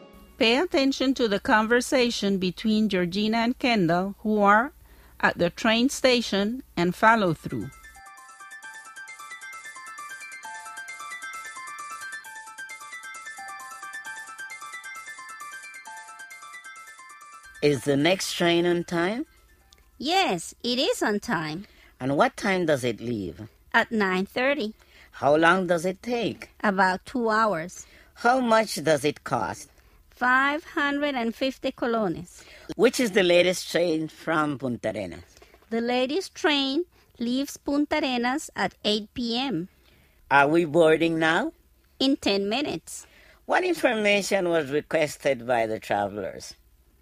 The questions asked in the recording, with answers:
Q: What information was requested by the travelers?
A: If the train was on time and the departure time, the length of the traveling, and the price of the train ticket.